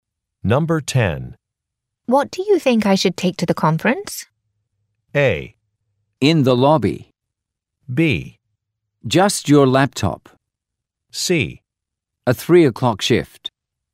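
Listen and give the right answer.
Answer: B: Just your laptop.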